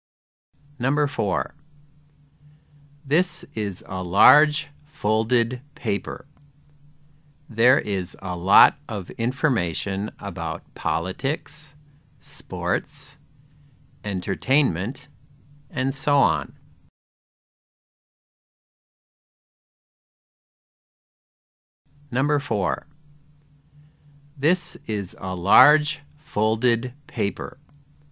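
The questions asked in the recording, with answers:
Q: This is a large folded paper. There is a lot of information about politics, sports, entertainment, and so on.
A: newspaper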